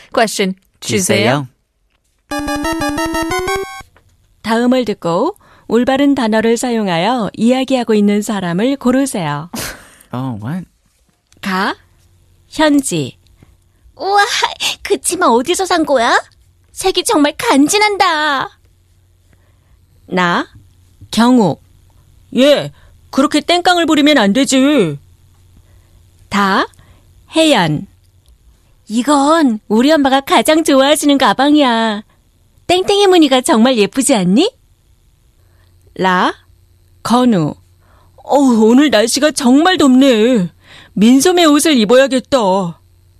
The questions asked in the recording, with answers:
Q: 다음을 듣고 올바른 단어를 사용하여 이야기하고 있는 사람을 고르세요.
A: So that leaves us with three wrong answers and the last one, la, being the correct answer.